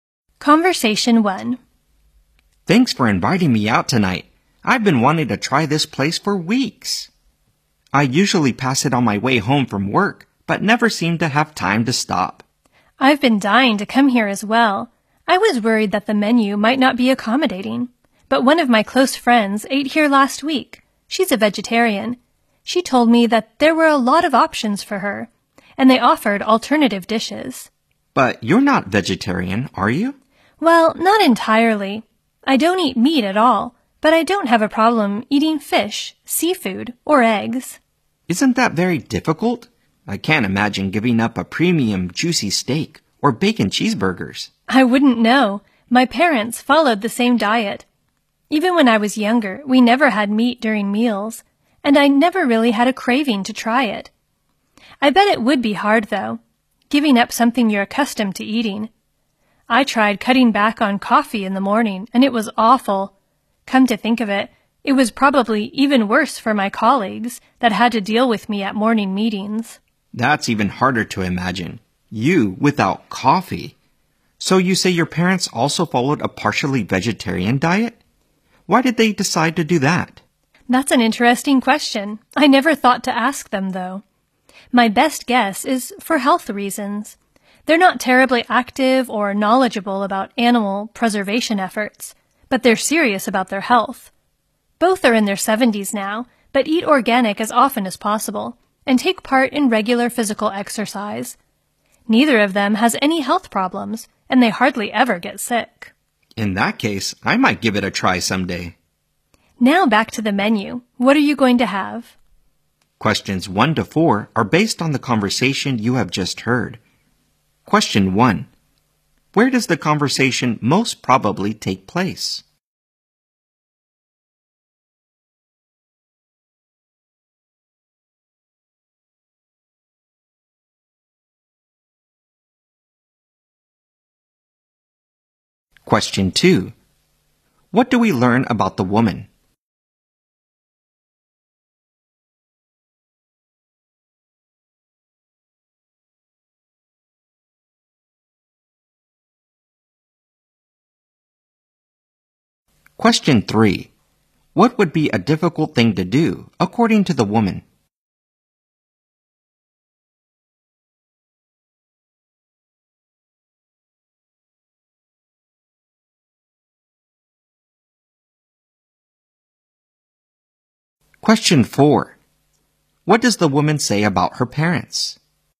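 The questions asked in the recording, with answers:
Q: Where does the conversation most probably take place?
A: In a restaurant

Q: What does the woman say about her parents?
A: They are in their 70s, serious about their health, and hardly ever get sick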